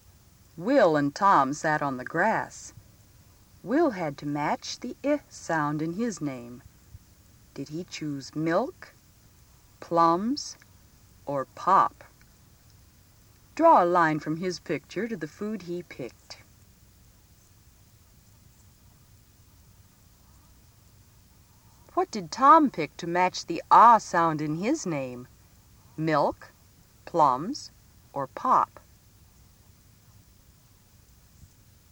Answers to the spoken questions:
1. You should have given the milk to Will
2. the pop to Tom